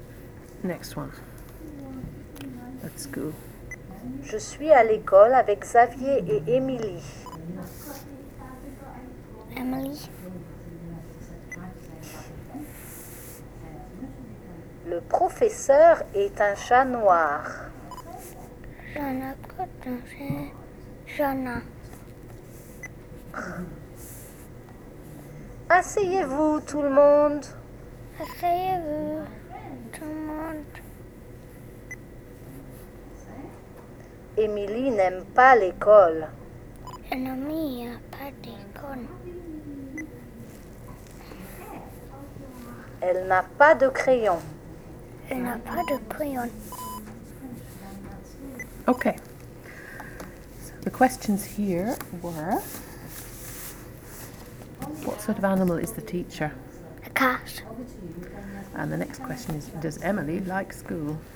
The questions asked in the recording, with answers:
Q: does Emily like school?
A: I don't think she does. No.